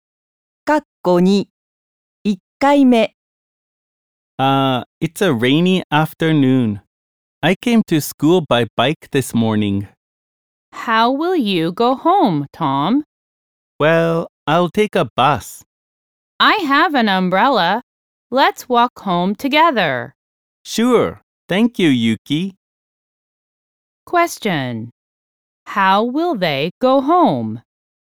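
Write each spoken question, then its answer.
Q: How will they go home?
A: They will walk home.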